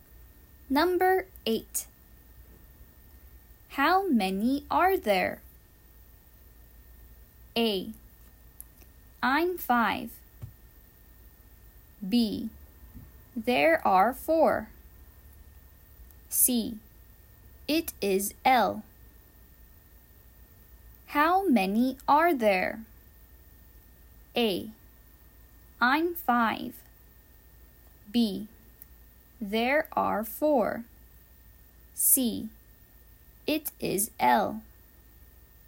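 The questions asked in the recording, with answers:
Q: How many are there?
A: B: There are 4.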